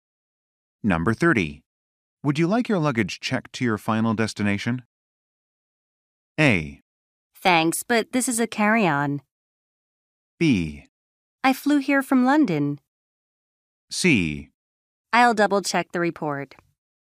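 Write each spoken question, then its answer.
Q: Would you like your luggage checked to your final destination?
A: A: Thanks, but this is a carry-on.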